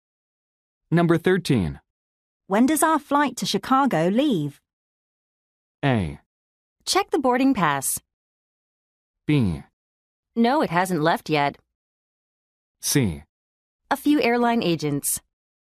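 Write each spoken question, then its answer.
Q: When does our flight to Chicago leave?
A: A: Check the boarding pass.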